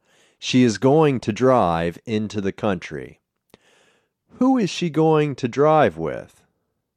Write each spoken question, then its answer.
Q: Who is she going to drive with?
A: She is going to drive with Taz.